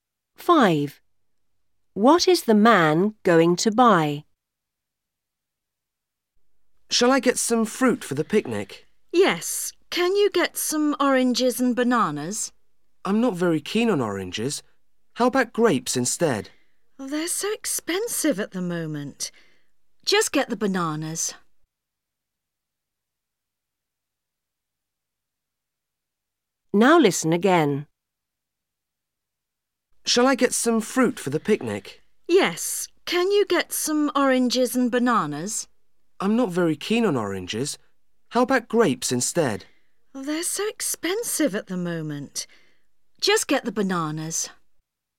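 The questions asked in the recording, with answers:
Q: What is the man going to buy?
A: Bananas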